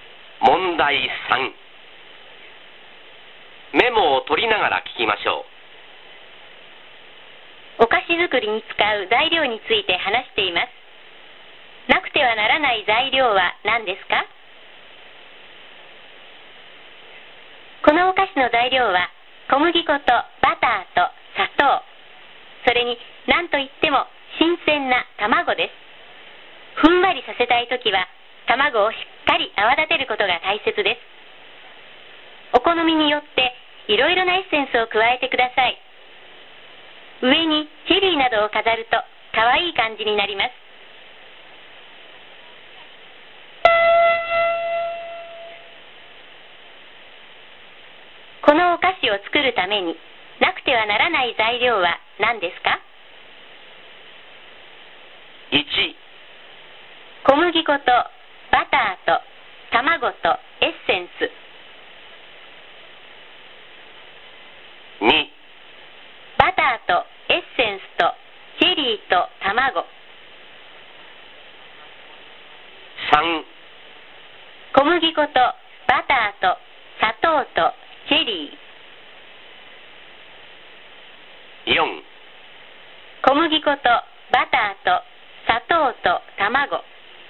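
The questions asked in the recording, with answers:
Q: このお菓子を作るためになくてはならない材料は何ですか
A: 4: 小麦粉とバターと砂糖と卵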